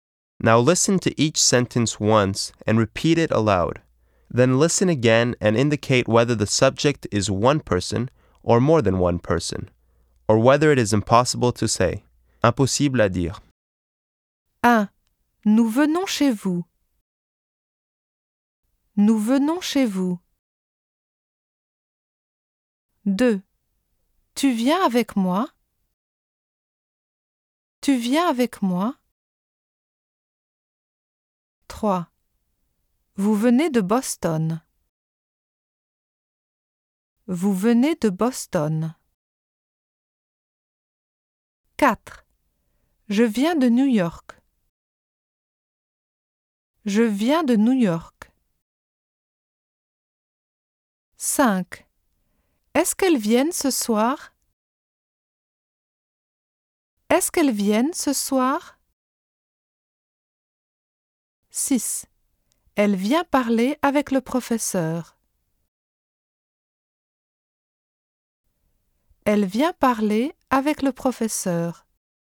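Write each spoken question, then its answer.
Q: Nous venons chez vous.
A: more than one person

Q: Tu viens avec moi.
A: one person

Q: Vous venez de Boston.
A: impossible to say

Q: Je viens de New York.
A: one person

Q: Est-ce qu'elles viennent ce soir?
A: more than one person

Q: Elle vient parler avec le professeur.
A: one person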